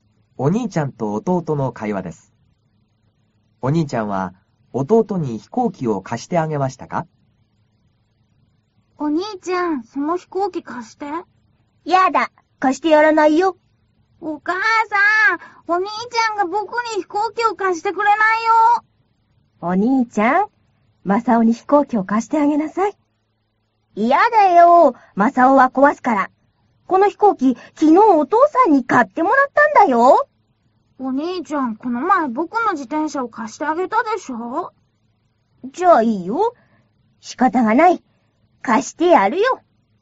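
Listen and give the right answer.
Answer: はい、貸してあげました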